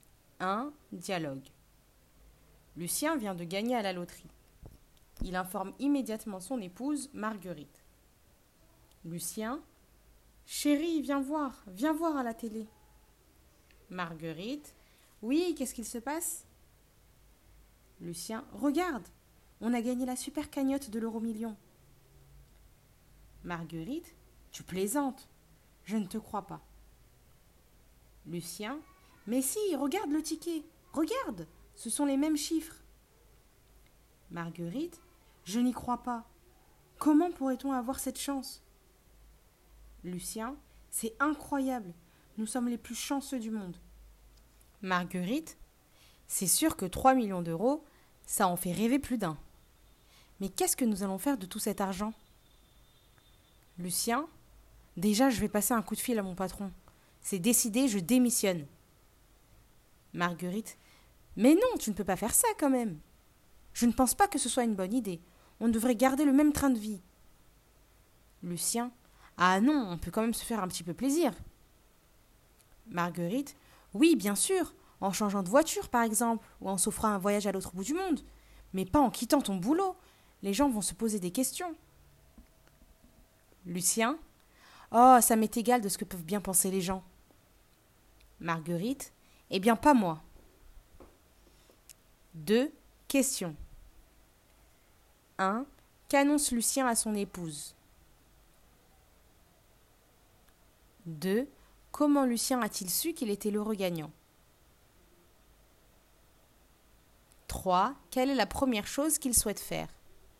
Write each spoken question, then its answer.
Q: Qu'annonce Lucien à son épouse?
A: qu'ils ont gagné à la loterie.

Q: Comment Lucien a-t-il su qu'il était l'heureux gagnant?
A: En regardant la télévision.

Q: Quelle est la première chose qu'il souhaite faire?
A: Démissionner.